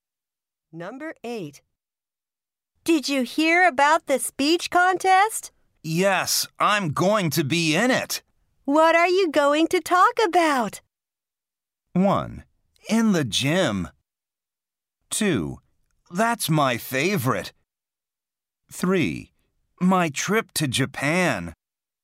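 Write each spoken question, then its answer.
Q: What are you going to talk about?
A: 3: My trip to Japan.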